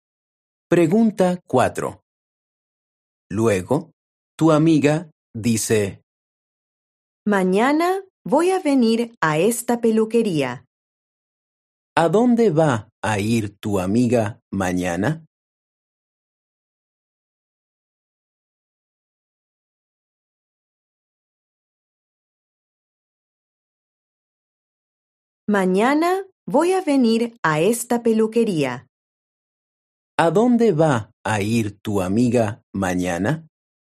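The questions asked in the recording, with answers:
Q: ¿A dónde va a ir tu amiga mañana?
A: a la peluquería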